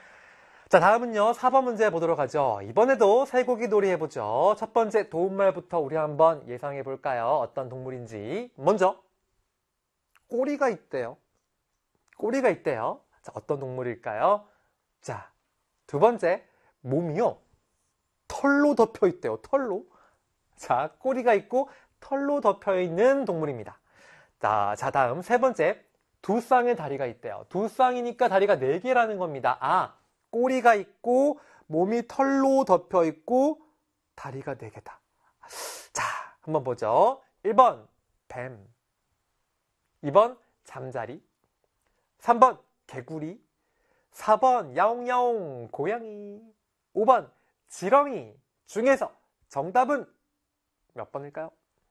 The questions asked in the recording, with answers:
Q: 5번 지렁이 중에서 정답은 몇 번일까요?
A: 따라서 아하, 4번의 정답은 4번이겠다.